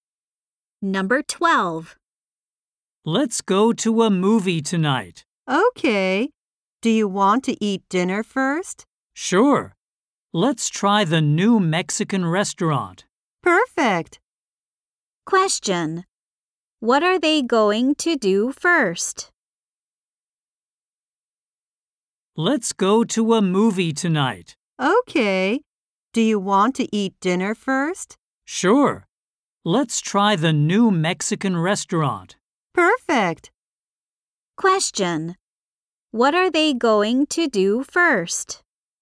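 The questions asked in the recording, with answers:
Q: What are they going to do first?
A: Eat dinner at the new Mexican restaurant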